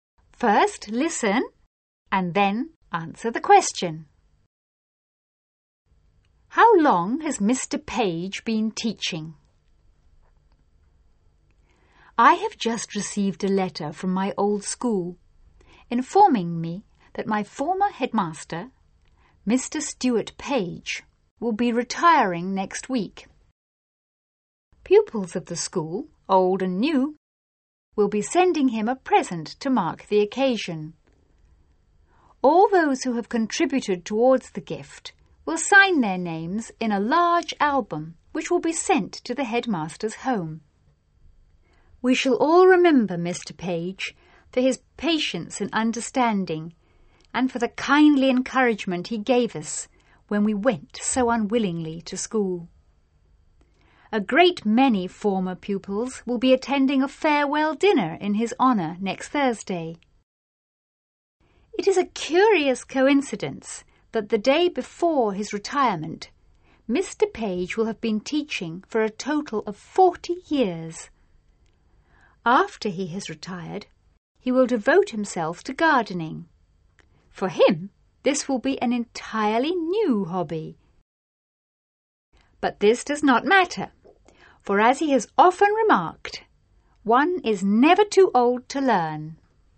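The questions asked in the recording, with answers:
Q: How long has Mr. Page been teaching?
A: For (almost) 40 years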